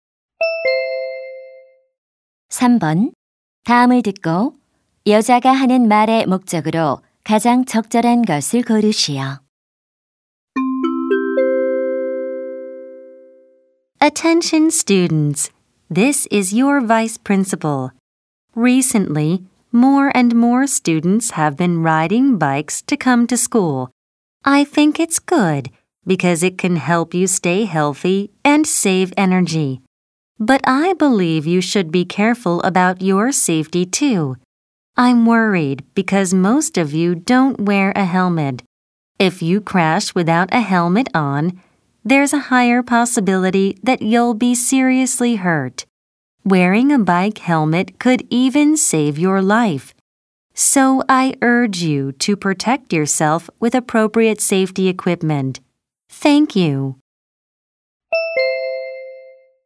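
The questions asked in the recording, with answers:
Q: 다음을 듣고 여자가 하는 말의 목적으로 가장 적절한 것을 고르시오.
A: 자전거 탈 때 헬멧 착용을 권장하려고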